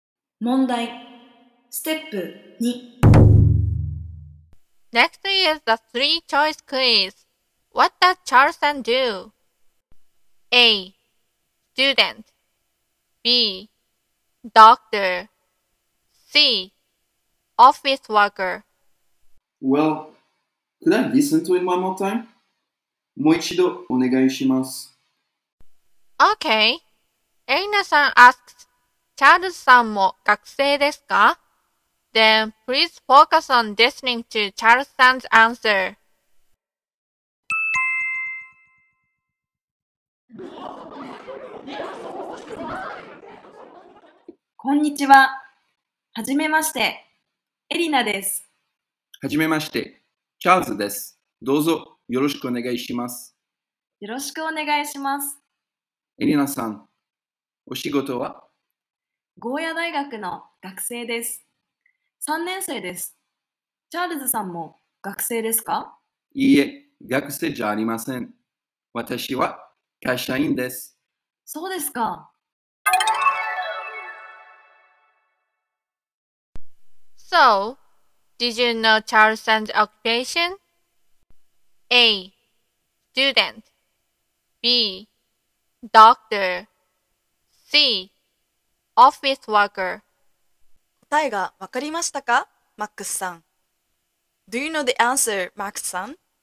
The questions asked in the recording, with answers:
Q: What does Charleston do? A. Student B. Doctor C. Office worker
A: He said, 私は会社員です。So the answer is C.